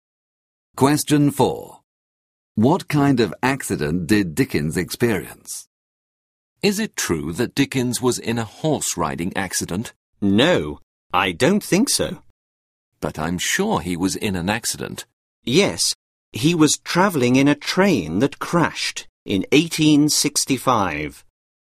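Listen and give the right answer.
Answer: a train crash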